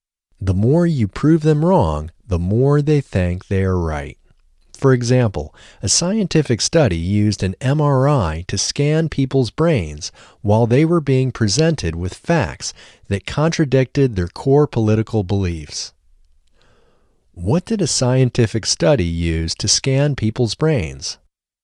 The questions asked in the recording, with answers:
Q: What did a scientific study use to scan people's brains?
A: A scientific study used an MRI to scan people's brains.